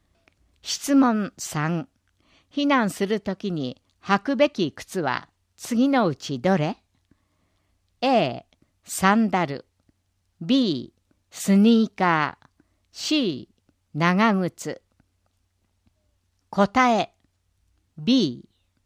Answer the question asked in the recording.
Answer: 答え B。